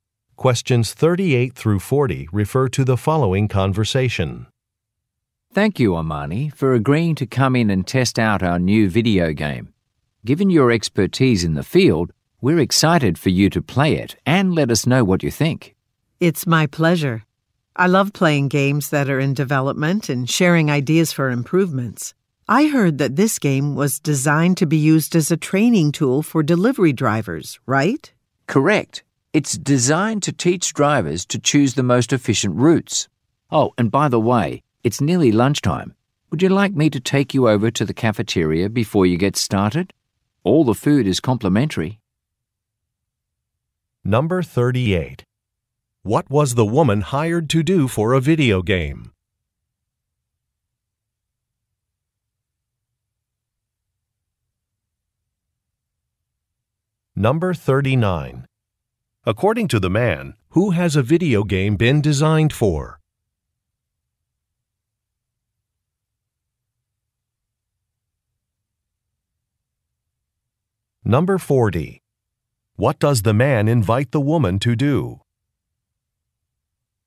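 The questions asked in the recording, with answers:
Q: What was the woman hired to do for a video game?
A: Test it and give feedback

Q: According to the man, who has a video game been designed for?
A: Delivery drivers

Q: What does the man invite the woman to do?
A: Go to the cafeteria for lunch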